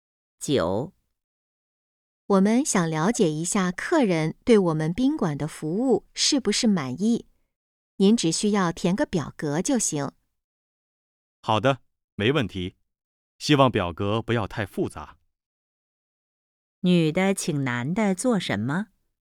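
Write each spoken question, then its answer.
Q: 女的请男的做什么?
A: 填表格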